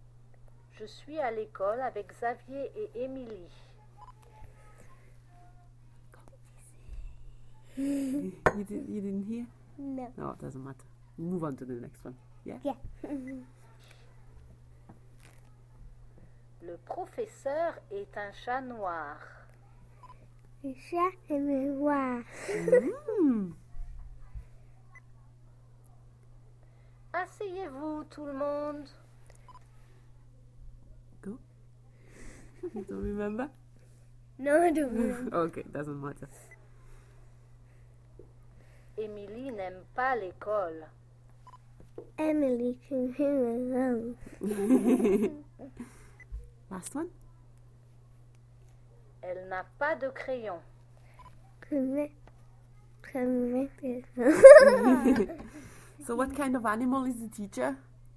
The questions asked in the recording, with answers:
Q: So what kind of animal is the teacher?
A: A cat.